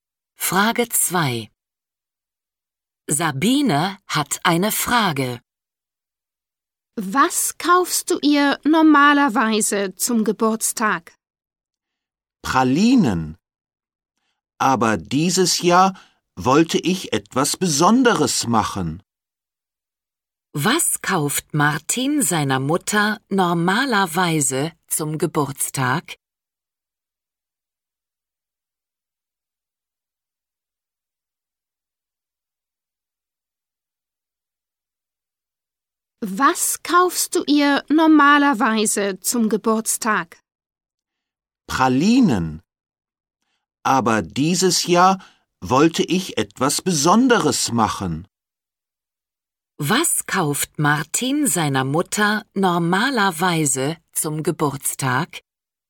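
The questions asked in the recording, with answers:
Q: Was kauft Martin seiner Mutter normalerweise zum Geburtstag?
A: Pralinen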